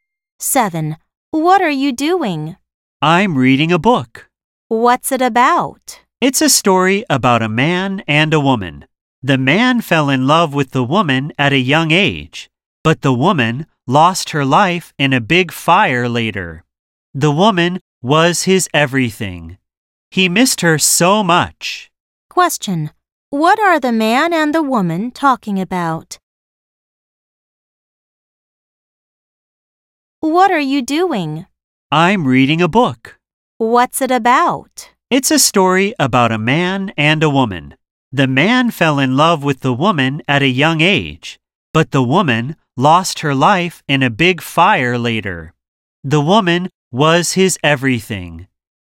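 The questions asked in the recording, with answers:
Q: Question: what are the man and the woman talking about?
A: A book (a love story)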